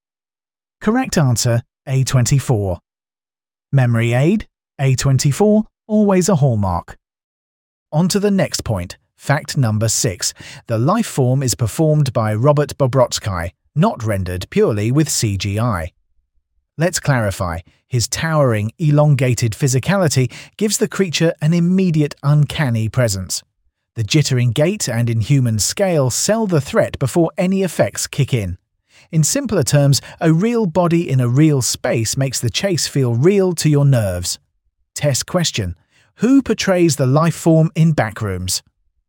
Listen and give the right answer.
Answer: Correct answer, Robert Bobrotsky.